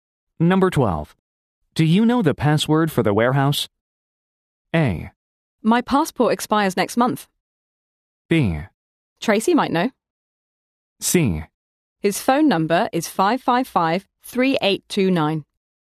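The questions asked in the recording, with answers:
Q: Do you know the password for the warehouse?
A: B: Tracy might know.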